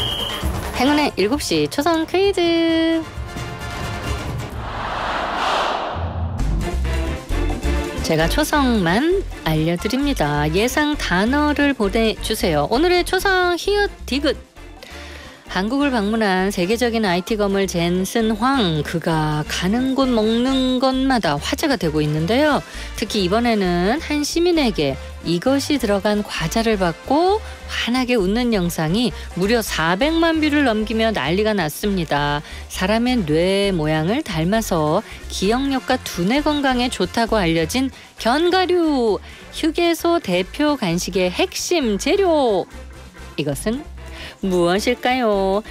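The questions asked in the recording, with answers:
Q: 사람의 뇌 모양을 닮아서 기억력과 두뇌 건강에 좋다고 알려진 견과류, 휴게소 대표 간식의 핵심 재료, 이것은 무엇일까요?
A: 호두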